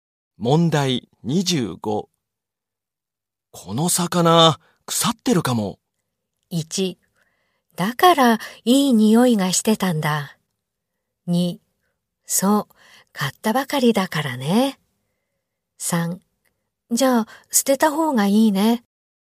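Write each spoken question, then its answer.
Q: この魚、腐ってるかも。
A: 3: じゃあ、捨てた方がいいね。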